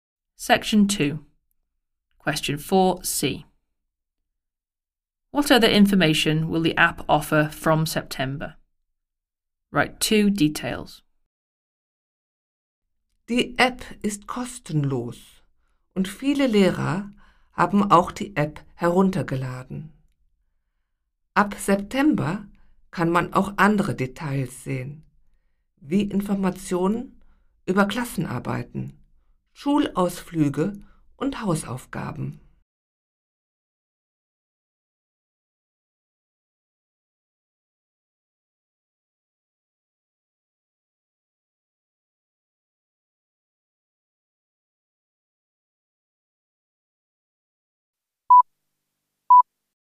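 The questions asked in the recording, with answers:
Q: What other information will the app offer from September?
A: Information about tests, school trips and homework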